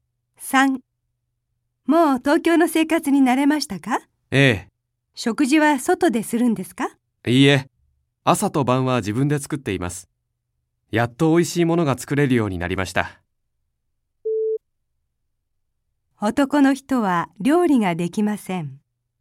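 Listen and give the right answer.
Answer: ×(自分で作っている)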